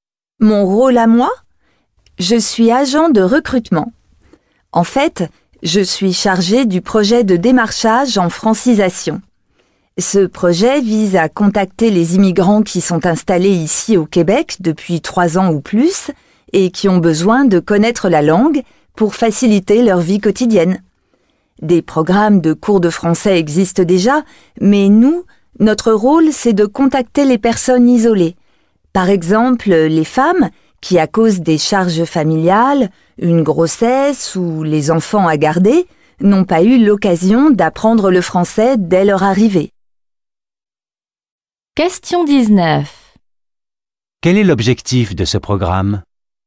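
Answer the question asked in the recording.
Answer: Contacter les immigrants isolés installés au Québec depuis 3 ans ou plus pour leur permettre d'apprendre le français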